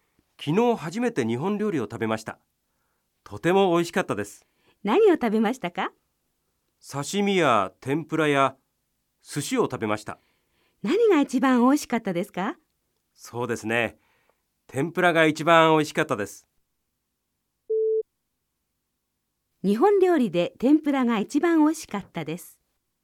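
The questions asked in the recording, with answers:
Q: 日本料理で天ぷらが一番美味しかったです。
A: ○(正しい)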